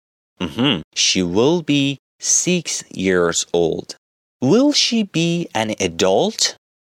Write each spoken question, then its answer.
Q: Will she be an adult?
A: No. She won't be an adult.